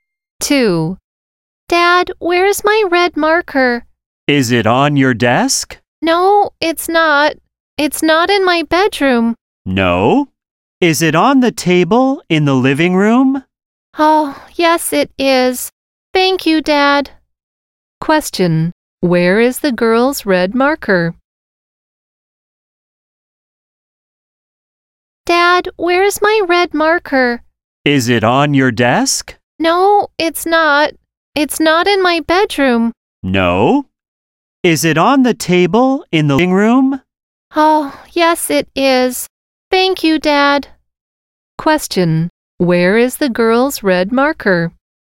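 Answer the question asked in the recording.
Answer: On the table in the living room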